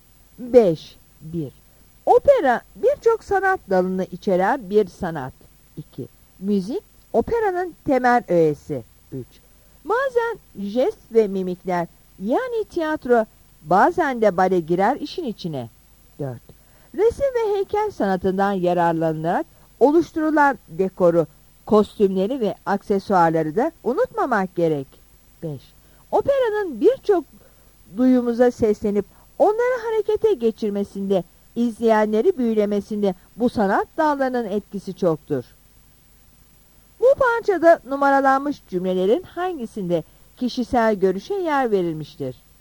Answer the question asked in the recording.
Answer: Yanıt E'dir.